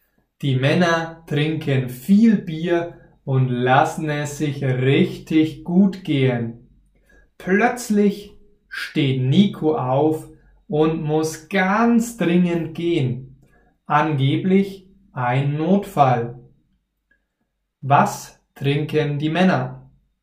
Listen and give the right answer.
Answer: Bier. Die Männer trinken Bier.